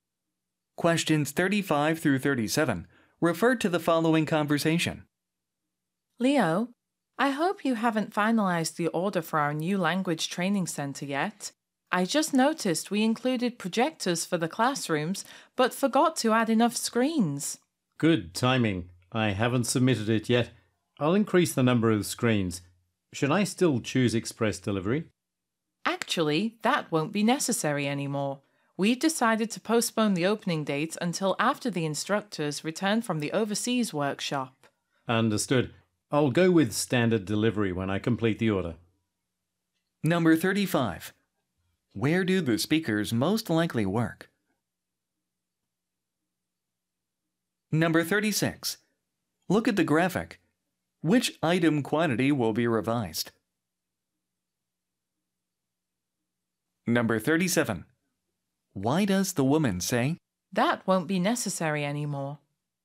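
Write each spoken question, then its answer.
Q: Where do the speakers most likely work?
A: At a language training center

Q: Why does the woman say,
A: The opening has been postponed, so express delivery is no longer needed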